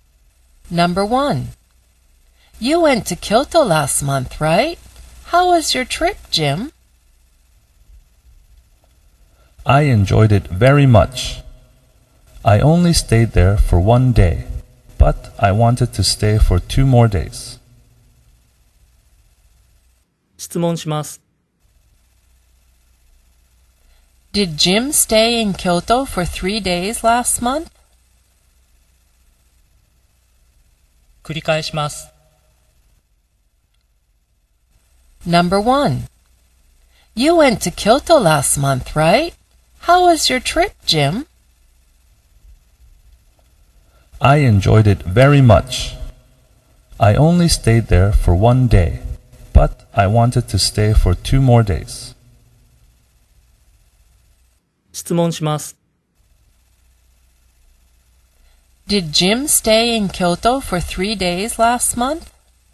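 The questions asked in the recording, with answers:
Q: Did Jim stay in Kyoto for three days last month?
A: No, he didn't. He stayed for only one day.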